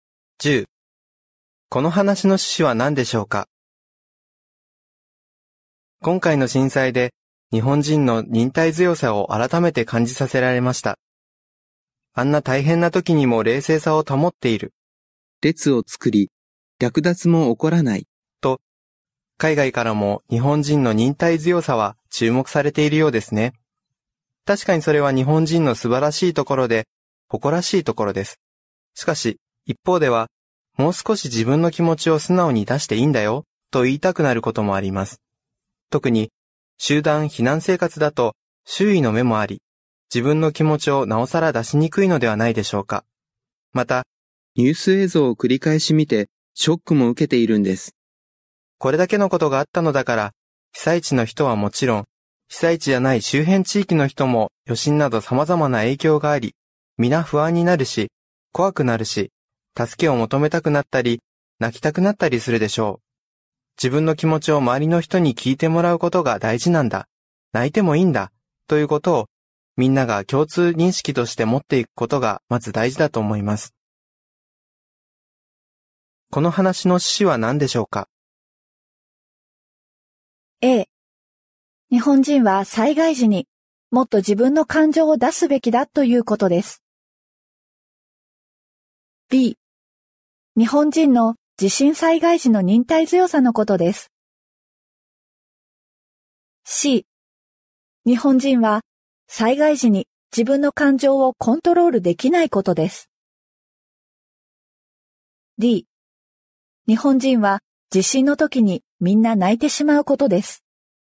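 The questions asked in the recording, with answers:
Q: この話の趣旨は何でしょうか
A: A: 日本人は災害時にもっと自分の感情を出すべきだということです。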